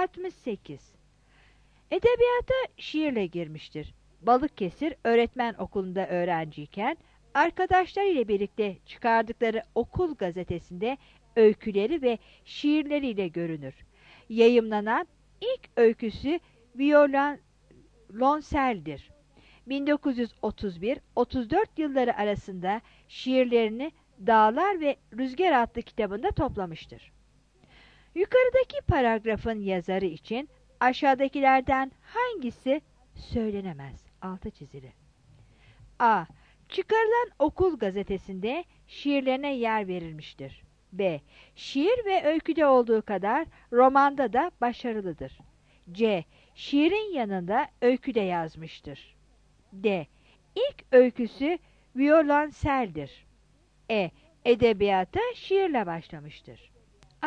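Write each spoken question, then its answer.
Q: Yukarıdaki paragrafın yazarı için aşağıdakilerden hangisi söylenemez?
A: B: Şiir ve öyküde olduğu kadar romanda da başarılıdır.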